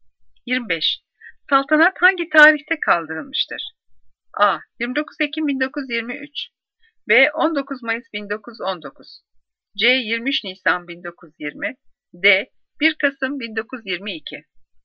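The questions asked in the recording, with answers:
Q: Saltanat hangi tarihte kaldırılmıştır?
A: D: 1 Kasım 1922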